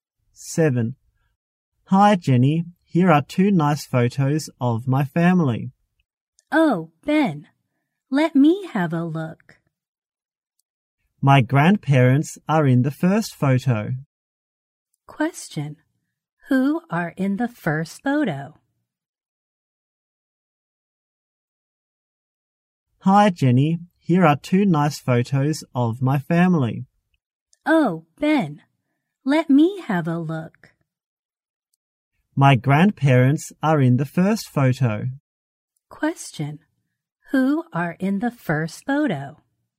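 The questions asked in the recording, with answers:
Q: Who are in the first photo?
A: Ben's grandparents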